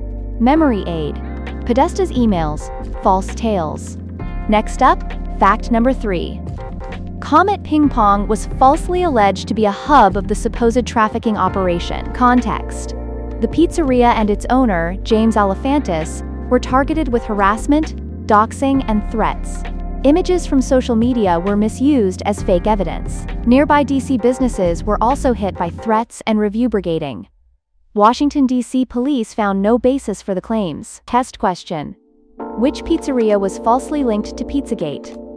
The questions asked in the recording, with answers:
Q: Which pizzeria was falsely linked to Pizzagate?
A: Comet Ping Pong.